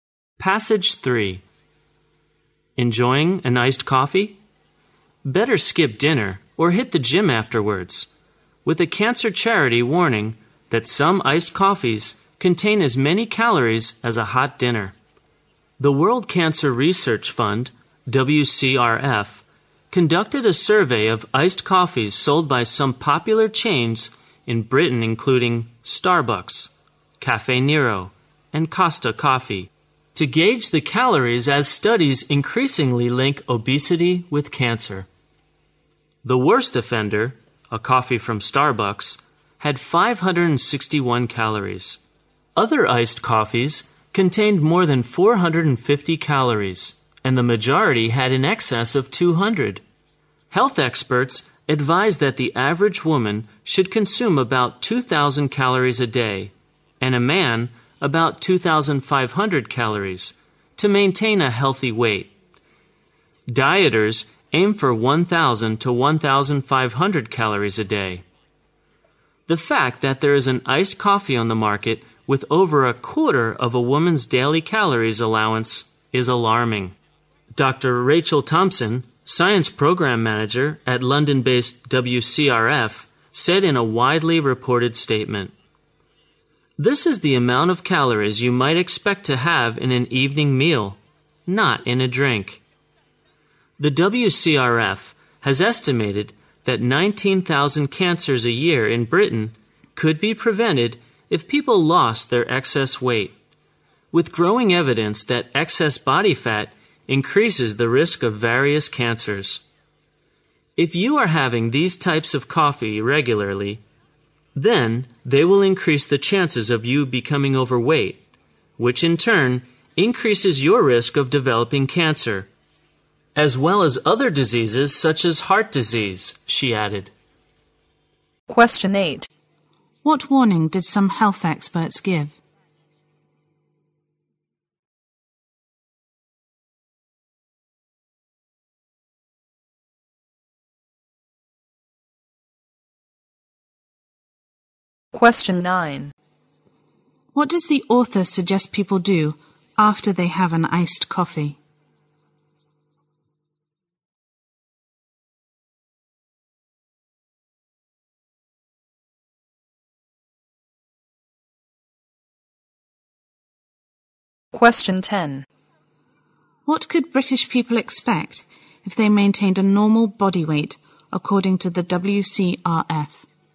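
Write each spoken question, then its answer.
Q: What warning did some health experts give?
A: Some iced coffees contain as many calories as a hot dinner

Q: What does the author suggest people do after they have an iced coffee?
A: Skip dinner or go to the gym

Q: What could British people expect if they maintained a normal body weight according to the WCRF?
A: 19,000 cancers a year could be prevented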